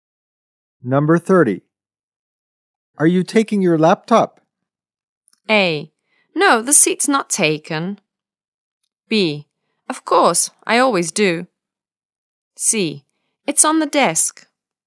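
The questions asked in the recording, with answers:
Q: Are you taking your laptop?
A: B: Of course, I always do.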